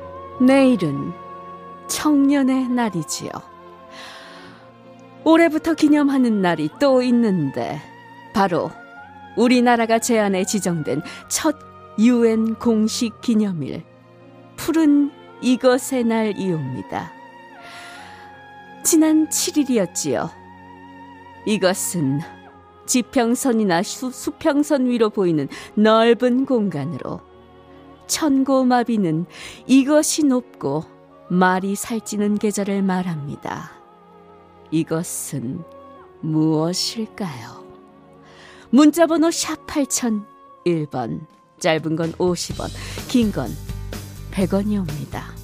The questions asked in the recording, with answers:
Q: 이것은 무엇일까요?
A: 하늘이었습니다.